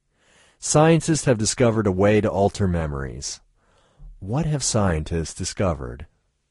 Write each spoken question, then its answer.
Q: What have scientists discovered?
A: They have discovered a way to alter memories.